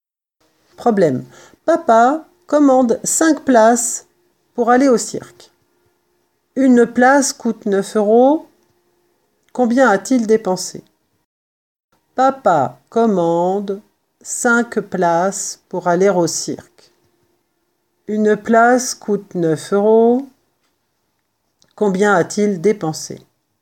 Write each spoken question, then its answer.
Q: Combien a-t-il dépensé?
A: L'opération à faire est donc 5 fois 9, 5 places fois 9 euros, égale 45 euros.